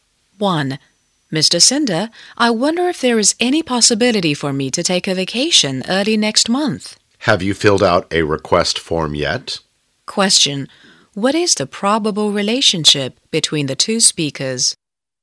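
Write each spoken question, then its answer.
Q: What is the probable relationship between the two speakers?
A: Employee and boss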